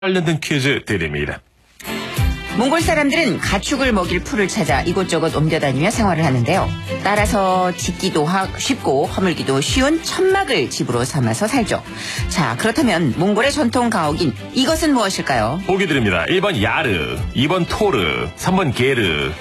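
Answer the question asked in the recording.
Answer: 3: 게르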